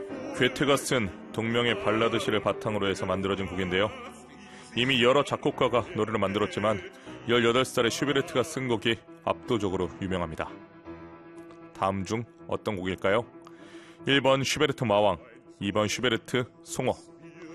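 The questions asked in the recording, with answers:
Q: 다음 중 어떤 곡일까요? 1번 슈베르트 마왕, 2번 슈베르트 송어.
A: 1: 슈베르트 마왕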